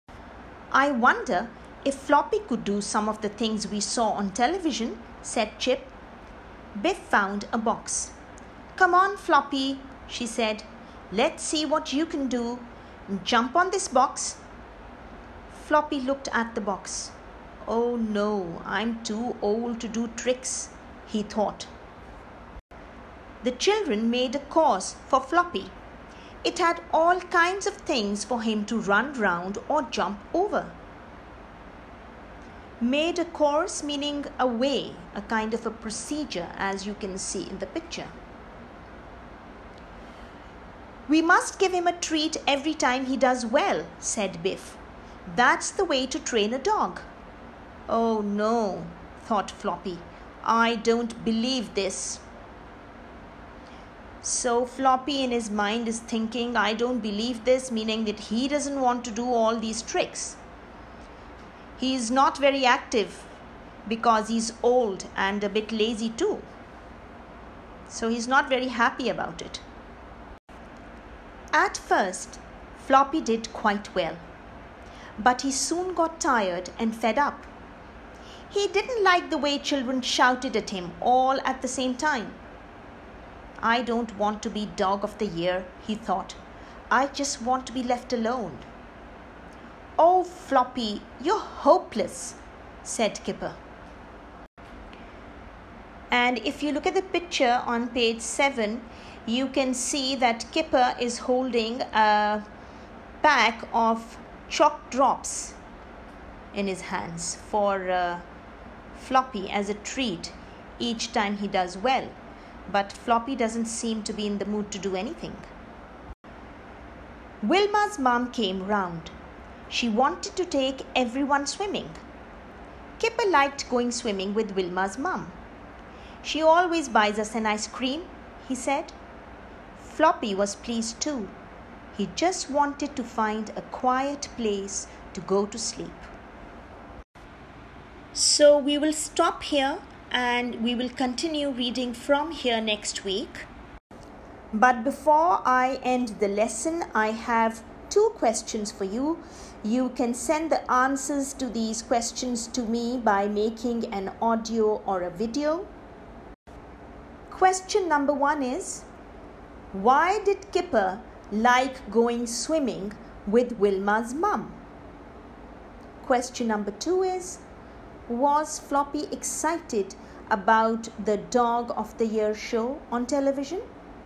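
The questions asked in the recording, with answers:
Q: why did Kipper like going swimming with Wilma's mum?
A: Because she always buys them an ice cream.

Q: was Floppy excited about the Dog of the Year show on television?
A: No, he didn't want to be Dog of the Year; he just wanted to be left alone.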